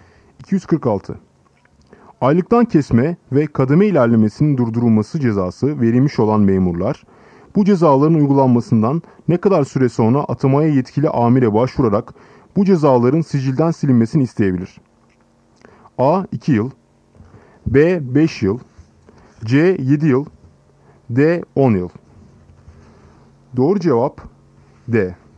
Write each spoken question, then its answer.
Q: Aylıktan kesme ve kademe ilerlemesinin durdurulması cezası verilmiş olan memurlar, bu cezaların uygulanmasından ne kadar süre sonra atamaya yetkili amire başvurarak bu cezaların sicilden silinmesini isteyebilir?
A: Doğru cevap D. 10 yıl.